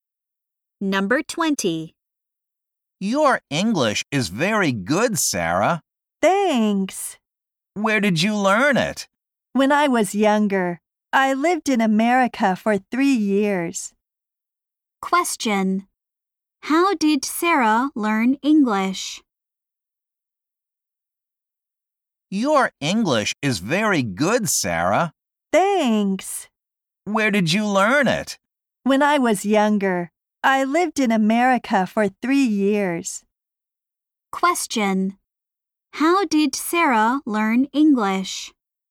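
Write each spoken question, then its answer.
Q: How did Sarah learn English?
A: She lived in America for 3 years.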